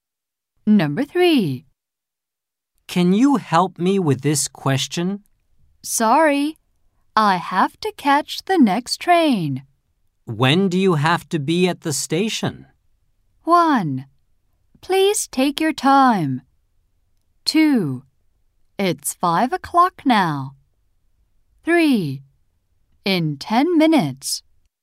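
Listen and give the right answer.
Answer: 3: In 10 minutes.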